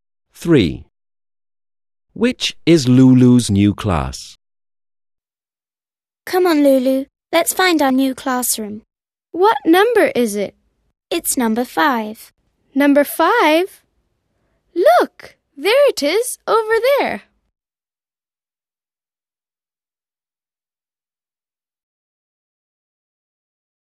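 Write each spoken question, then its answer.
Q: Which is Lulu's new class?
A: Number 5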